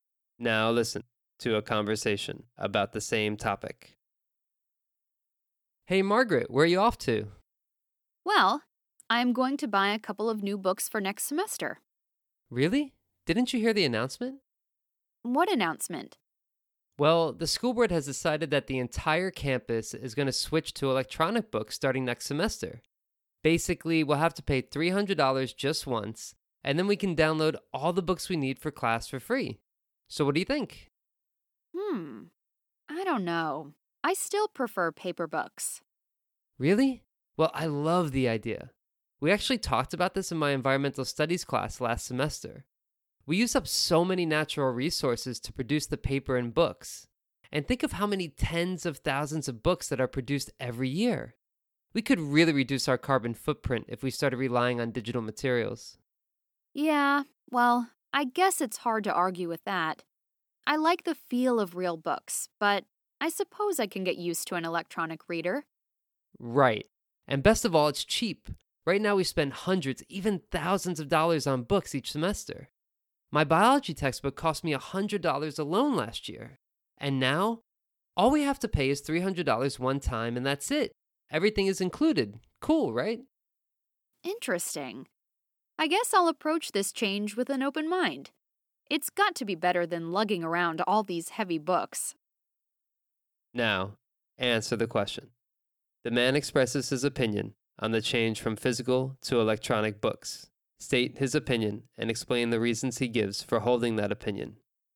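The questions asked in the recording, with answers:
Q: The man expresses his opinion on the change from physical to electronic books. State his opinion and explain the reasons he gives for holding that opinion.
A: He supports the switch to e-books: it saves natural resources and reduces the carbon footprint, and it is cheaper ($300 once instead of hundreds or thousands of dollars each semester).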